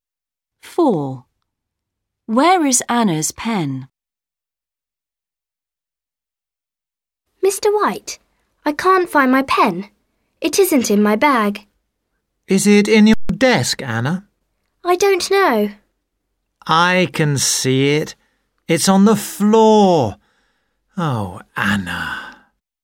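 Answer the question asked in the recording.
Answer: On the floor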